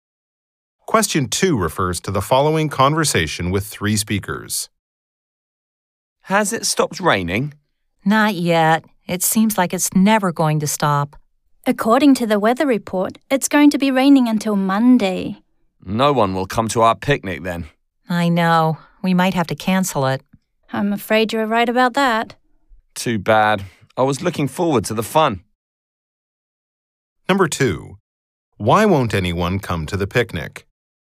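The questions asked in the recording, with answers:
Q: Why won't anyone come to the picnic?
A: It's raining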